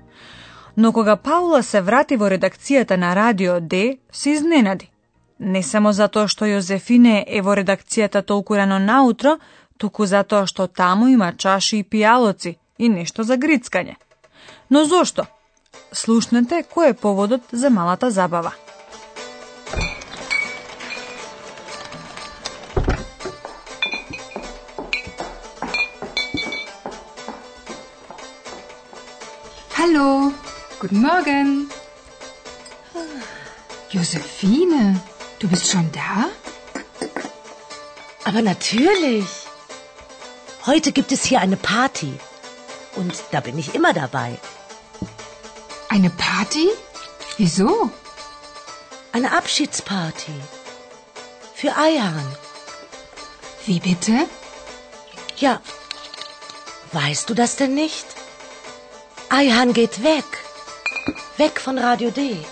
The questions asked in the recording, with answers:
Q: Но зошто? слушнете кој е поводот за малата забава.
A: Сигурно слушнавте дека забавата се прави во чест на Ајхан.